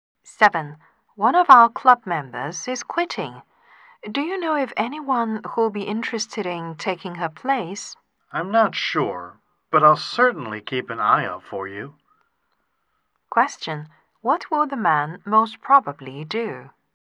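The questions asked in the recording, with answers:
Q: What will the man most probably do?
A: Look for someone to take her place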